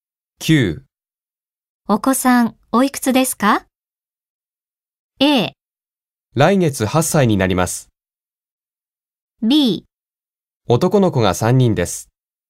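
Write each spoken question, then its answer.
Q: お子さん、おいくつですか?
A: A: 来月8歳になります。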